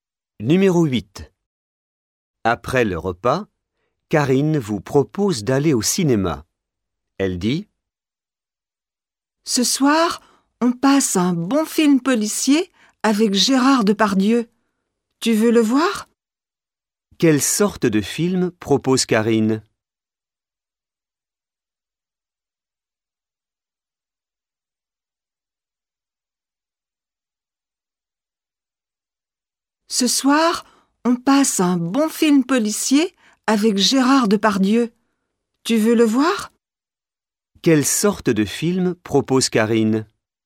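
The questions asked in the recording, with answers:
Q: Quelle sorte de film propose Karine?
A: Un film policier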